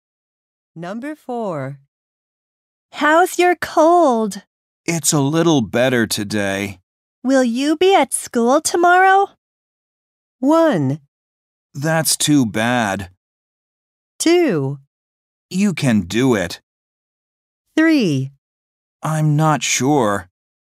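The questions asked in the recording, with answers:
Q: Will you be at school tomorrow?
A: 3: I'm not sure.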